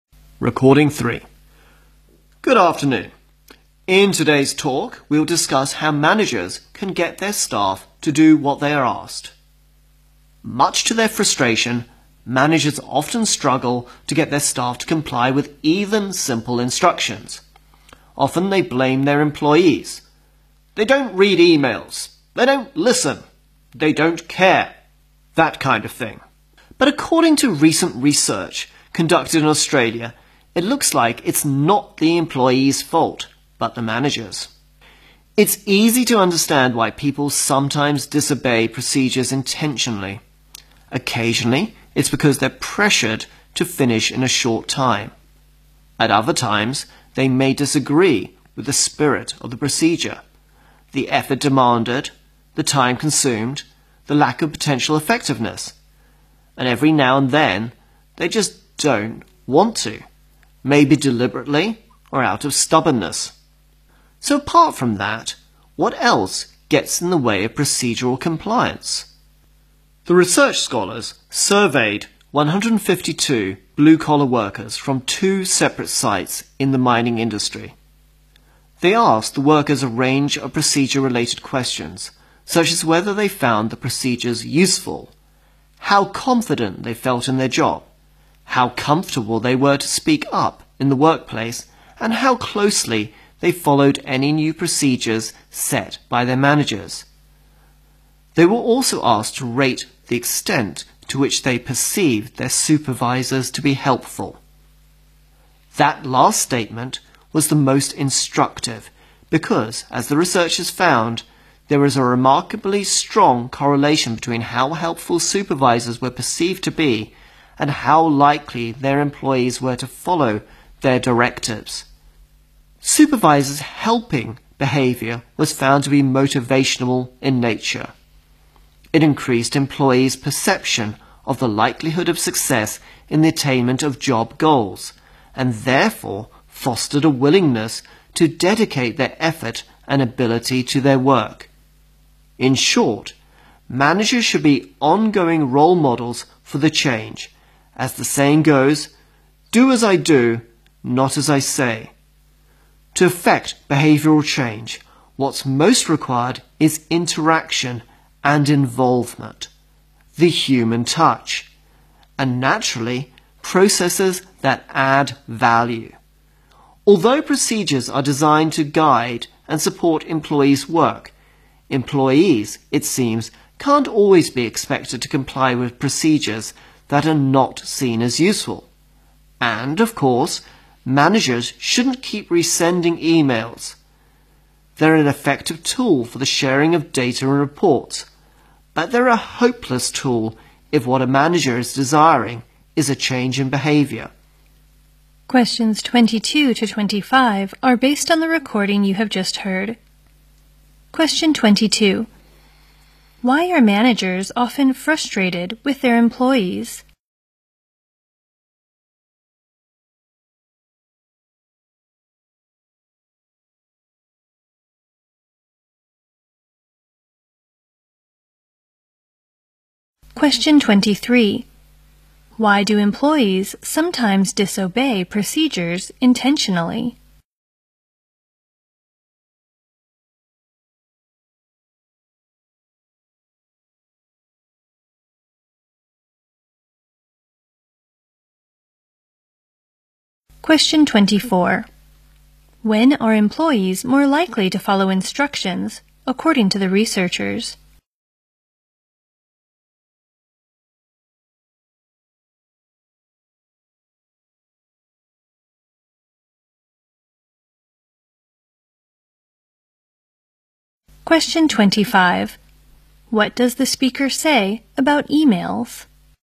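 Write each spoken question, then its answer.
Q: Why are managers often frustrated with their employees?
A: Their staff often fail to follow even simple instructions.

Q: Why do employees sometimes disobey procedures intentionally?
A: They are pressured to finish quickly or they disagree with the procedure.

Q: When are employees more likely to follow instructions, according to the researchers?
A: When they see their supervisors as helpful.

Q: What does the speaker say about emails?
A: They are good for sharing data and reports but useless for changing behavior.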